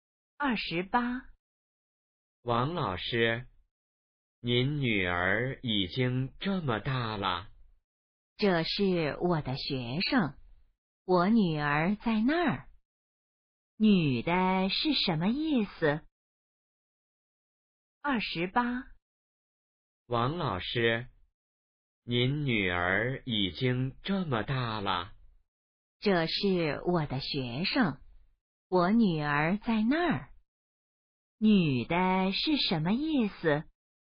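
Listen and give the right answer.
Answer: 那是学生,不是女儿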